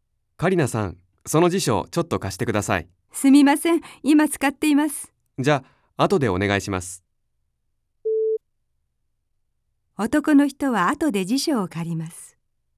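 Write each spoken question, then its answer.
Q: 男の人は後で辞書を借ります。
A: ○(正しい)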